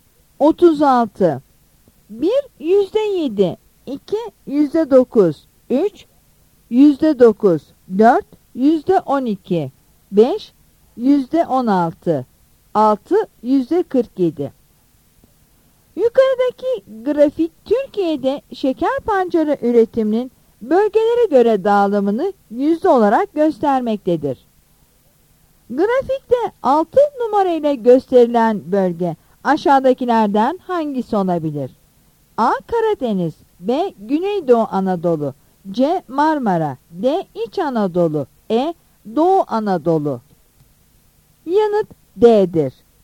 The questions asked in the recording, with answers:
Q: Grafikte 6 numarayla gösterilen bölge aşağıdakilerden hangisi olabilir?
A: Yanıt D'dir.